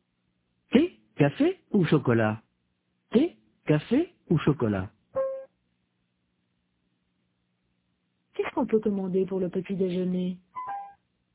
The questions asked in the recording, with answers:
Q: Qu'est-ce qu'on peut commander pour le petit déjeuner?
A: Du thé, du café ou du chocolat?